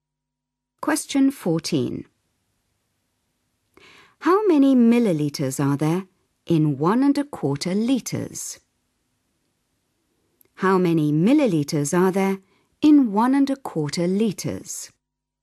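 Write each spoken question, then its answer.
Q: How many millilitres are there in 11⁄4 litres?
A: 1250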